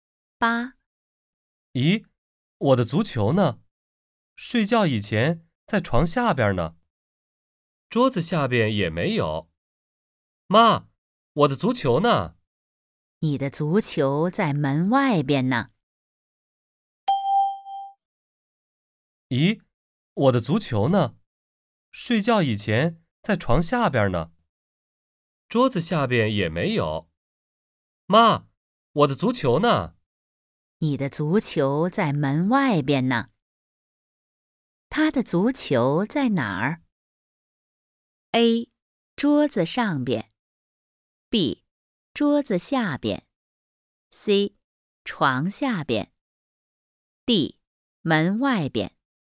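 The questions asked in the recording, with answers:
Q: 他的足球在哪儿?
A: D: 门外边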